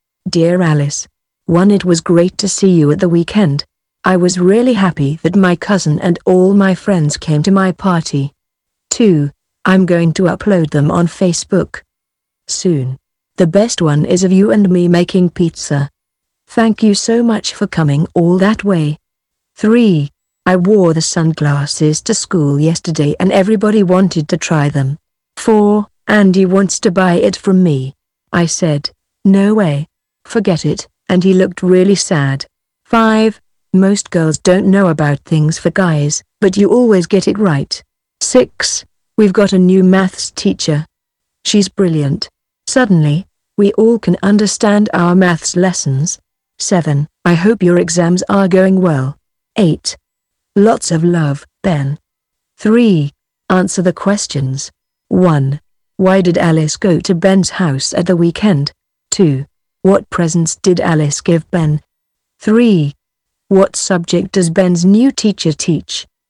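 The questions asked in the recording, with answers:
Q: Why did Alice go to Ben's house at the weekend?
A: For Ben's party

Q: What subject does Ben's new teacher teach?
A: Maths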